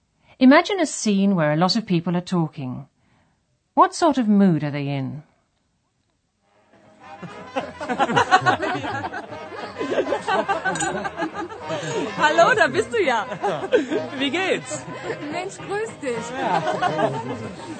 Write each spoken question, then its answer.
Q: What sort of mood are they in?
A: That was a party atmosphere where people are enjoying themselves.